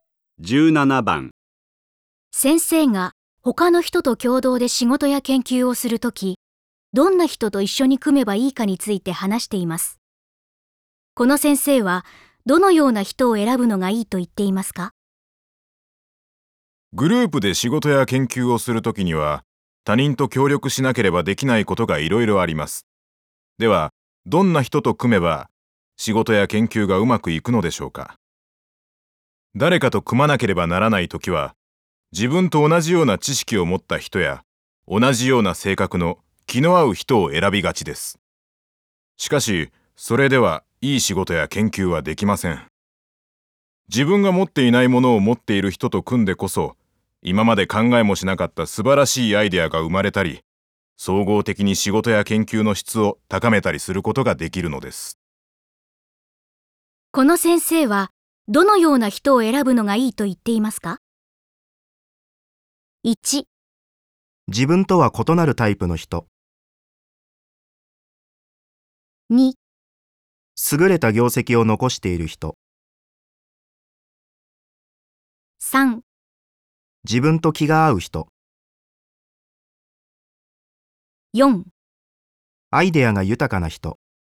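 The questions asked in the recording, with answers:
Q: この先生は、どのような人を選ぶのがいいと言っていますか?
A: 1: 自分とは異なるタイプの人。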